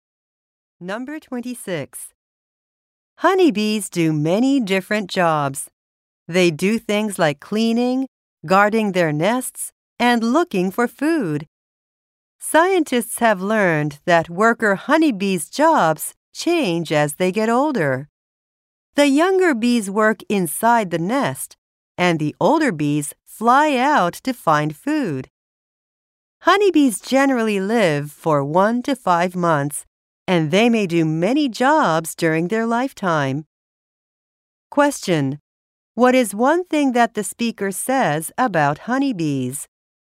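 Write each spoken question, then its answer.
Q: What is one thing that the speaker says about honeybees?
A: Their jobs change as they get older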